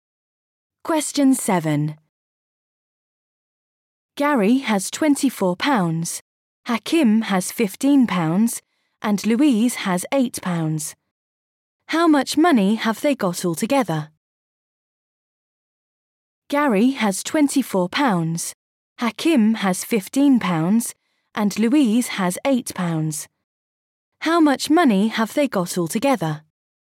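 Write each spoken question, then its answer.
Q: How much money have they got altogether?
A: £47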